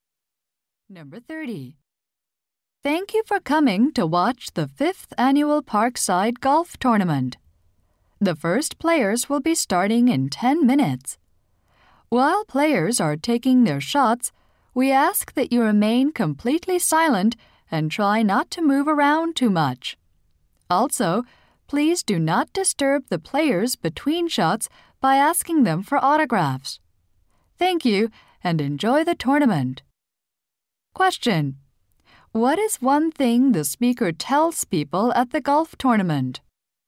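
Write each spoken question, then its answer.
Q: What is one thing the speaker tells people at the golf tournament?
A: Stay silent during shots and don't ask for autographs.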